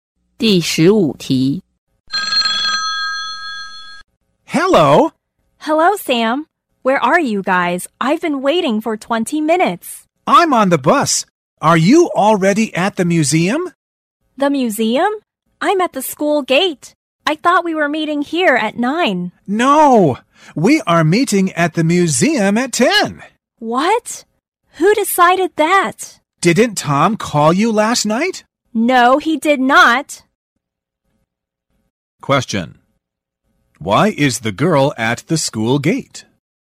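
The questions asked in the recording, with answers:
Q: Why is the girl at the school gate?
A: She thought they were meeting there at 9; nobody told her about the change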